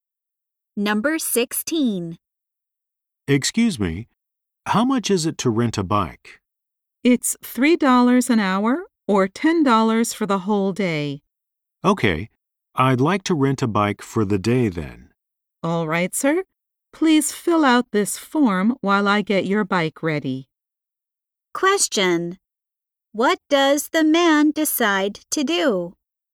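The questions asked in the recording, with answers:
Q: What does the man decide to do?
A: Rent a bike for the whole day.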